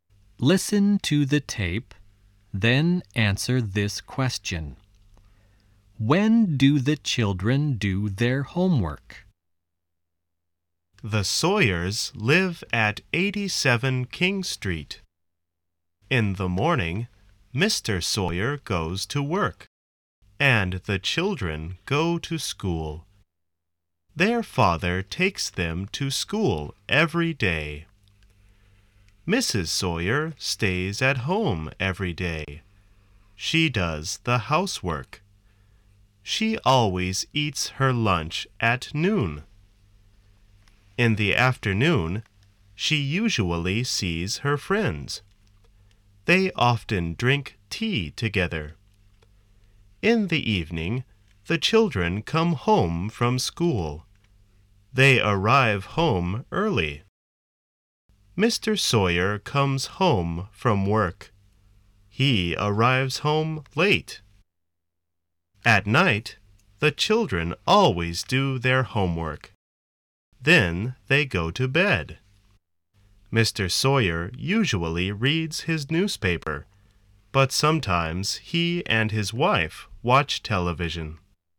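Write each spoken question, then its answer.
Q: When do the children do their homework?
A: At night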